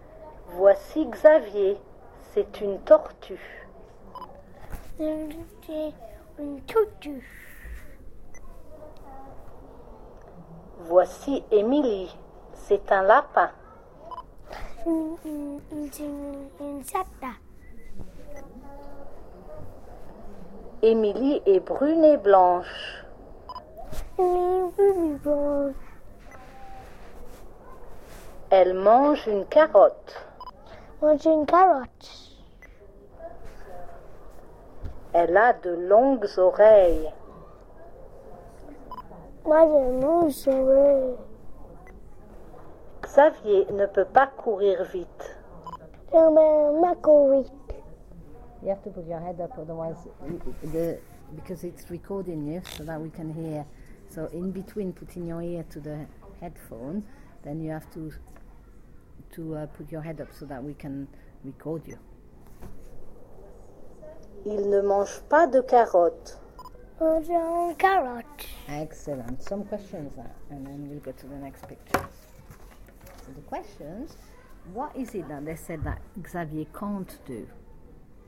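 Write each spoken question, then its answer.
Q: So the questions, what is it that they said that Xavier can't do?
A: Run fast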